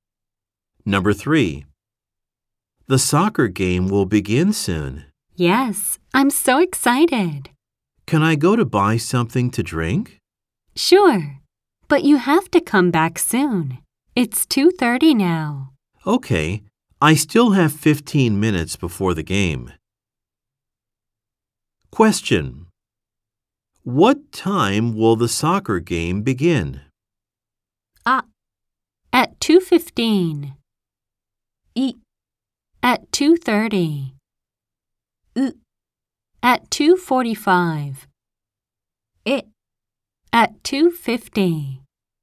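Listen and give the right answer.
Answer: う: At 2:45.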